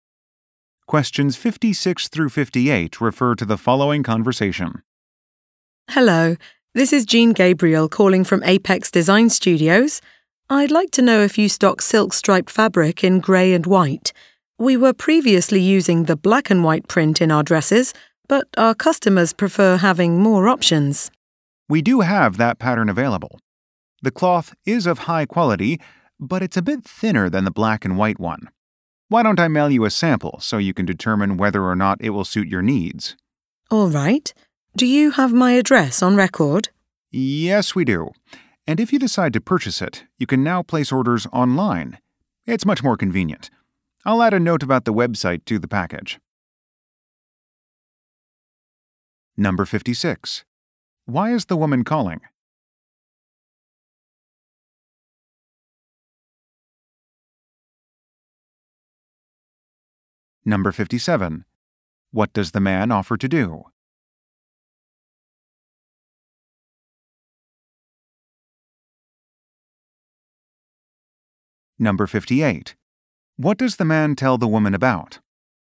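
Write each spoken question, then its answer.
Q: Why is the woman calling?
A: To ask if grey and white striped silk fabric is in stock

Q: What does the man offer to do?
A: Mail a sample

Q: What does the man tell the woman about?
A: Placing orders online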